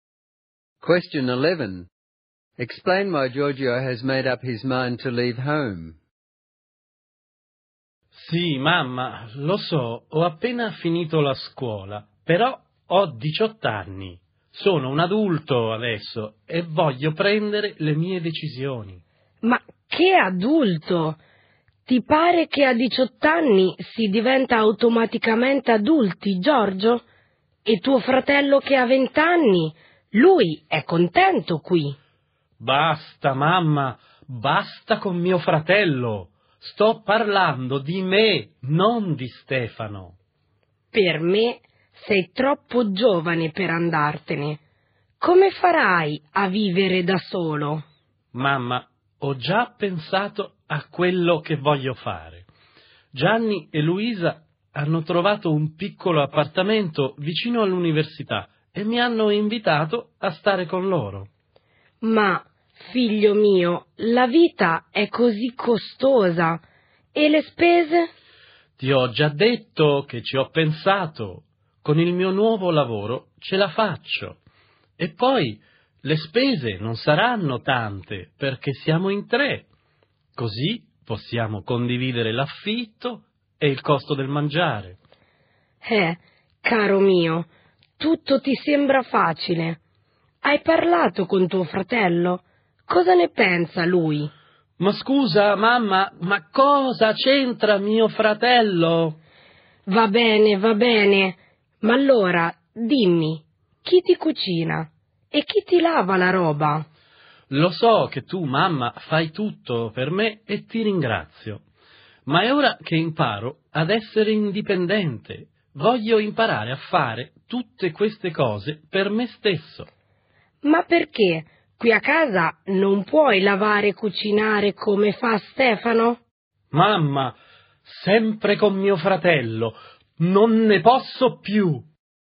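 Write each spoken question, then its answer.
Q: Explain why Giorgio has made up his mind to leave home.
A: He is 18 and wants to make his own decisions and become independent; friends invited him to share a flat and his new job will cover the shared costs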